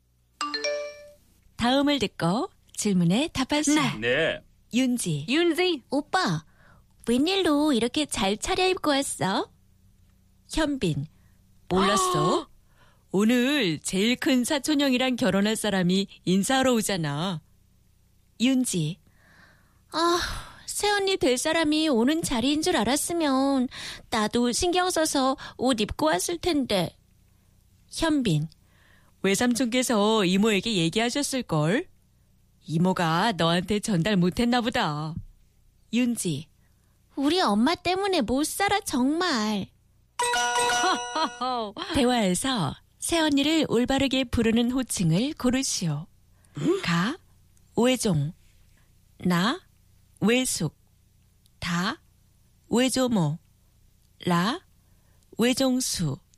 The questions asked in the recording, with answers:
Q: 대화에서 새언니를 올바르게 부르는 호칭을 고르시오.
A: So the correct answer was La Wejongsu.